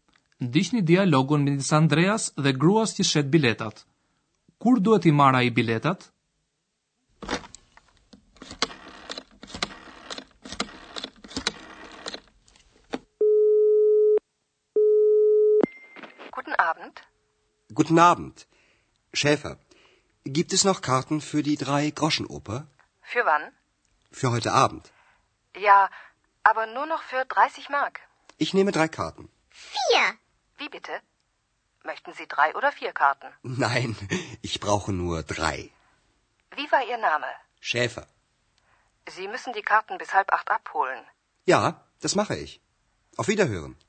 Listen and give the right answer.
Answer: Andrea duhet i marr biletat në orën 7 gjysëm.